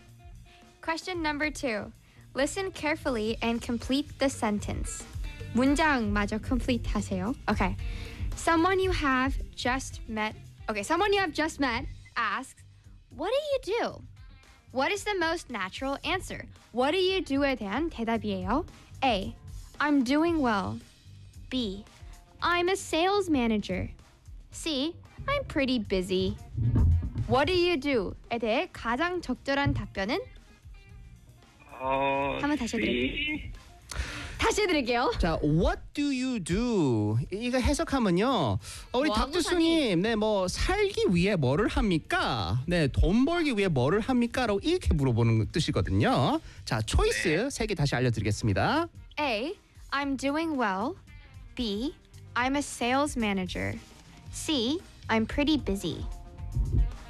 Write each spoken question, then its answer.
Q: Okay, someone you have just met asks, "What do you do?" What is the most natural answer?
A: 맞습니다. 그쵸. What do you do?